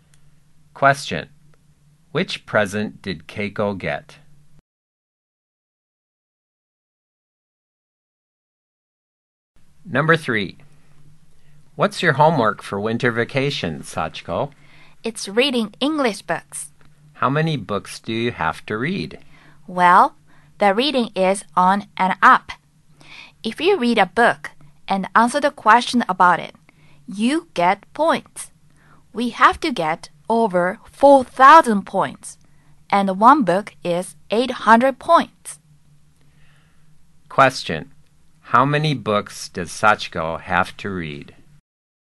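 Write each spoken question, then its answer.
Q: Question. How many books does Sachiko have to read?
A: Five books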